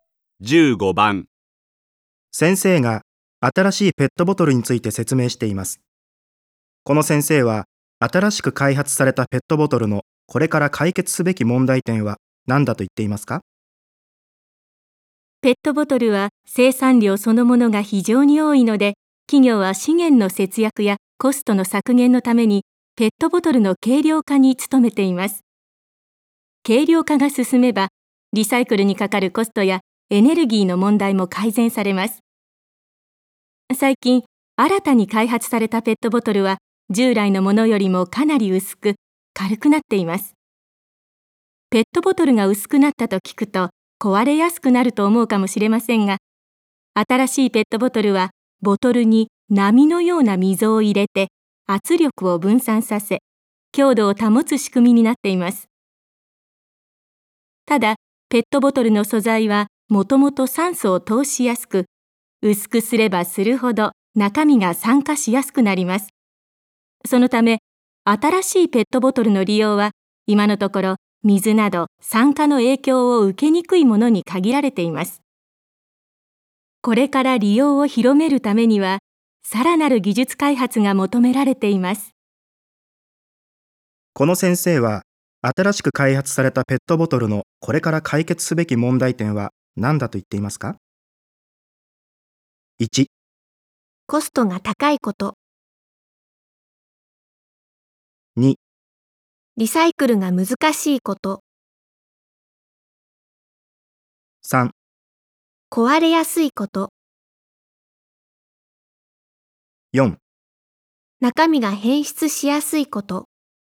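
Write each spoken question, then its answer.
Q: この先生は、新しく開発されたペットボトルのこれから解決すべき問題点は何だと言っていますか?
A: 4: 中身が変質しやすいこと。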